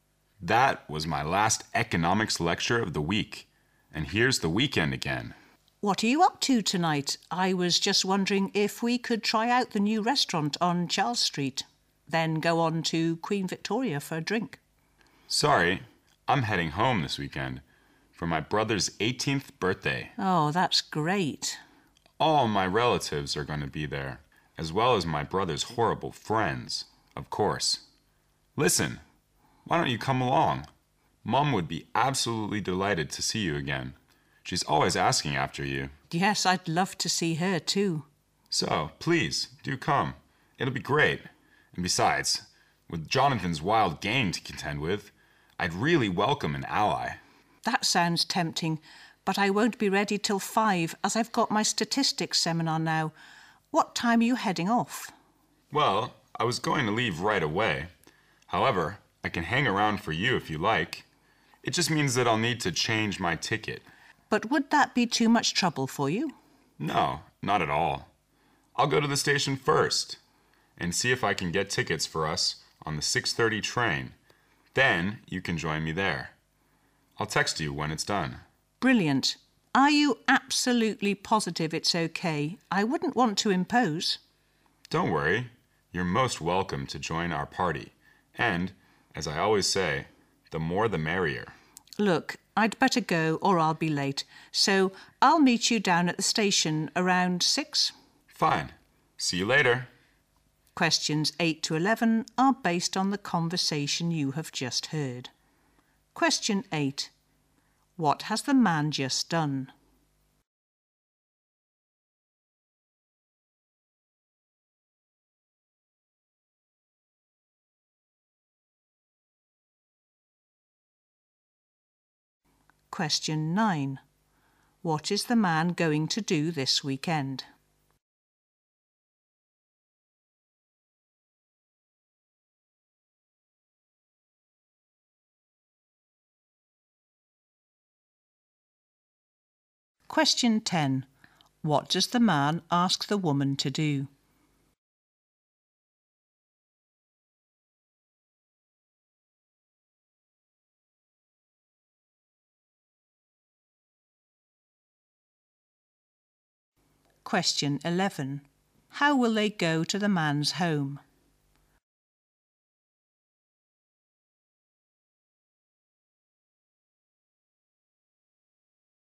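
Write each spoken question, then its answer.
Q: What has the man just done?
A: Attended his last economics lecture of the week

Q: What is the man going to do this weekend?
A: Go home for his brother's 18th birthday

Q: What does the man ask the woman to do?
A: Come along with him to the party

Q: How will they go to the man's home?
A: By train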